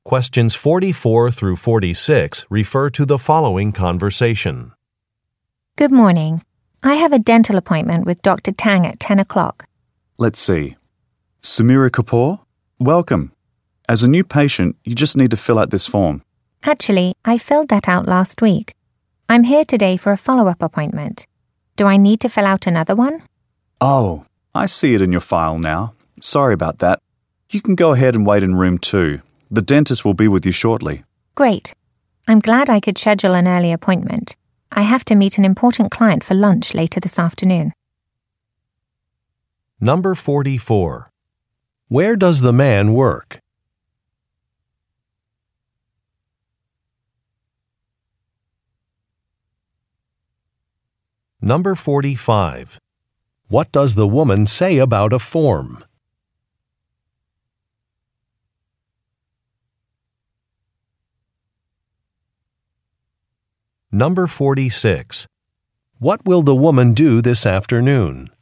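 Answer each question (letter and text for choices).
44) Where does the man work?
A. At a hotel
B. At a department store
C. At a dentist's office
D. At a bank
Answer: C. At a dentist's office

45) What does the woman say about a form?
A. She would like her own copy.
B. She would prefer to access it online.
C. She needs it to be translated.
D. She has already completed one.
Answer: D. She has already completed one.

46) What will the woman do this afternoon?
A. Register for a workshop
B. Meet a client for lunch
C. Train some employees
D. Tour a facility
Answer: B. Meet a client for lunch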